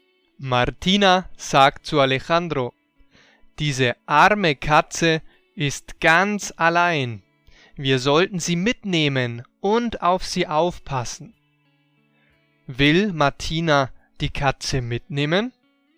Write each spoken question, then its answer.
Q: Will Martina die Katze mitnehmen?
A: Ja, sie will die Katze mitnehmen und auf sie aufpassen.